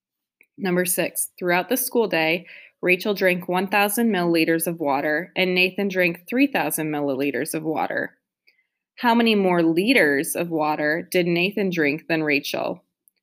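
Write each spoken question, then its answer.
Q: How many more liters of water did Nathan drink than Rachel?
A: 2 liters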